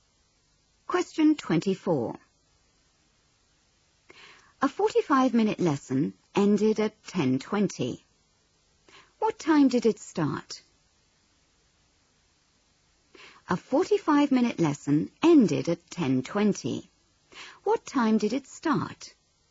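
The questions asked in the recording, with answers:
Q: What time did it start?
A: 9:35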